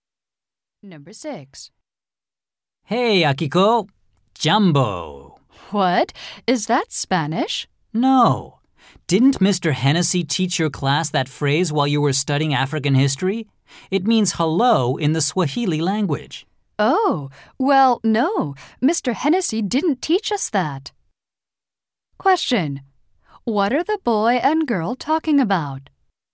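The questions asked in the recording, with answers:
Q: What are the boy and girl talking about?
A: A Swahili word for hello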